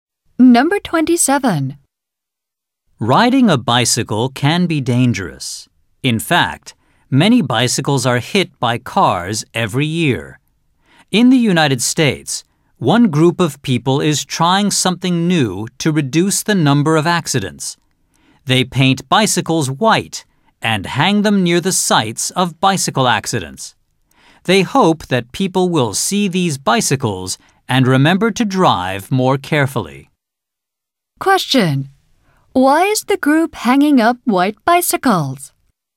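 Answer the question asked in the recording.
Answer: To remind drivers to drive more carefully and reduce accidents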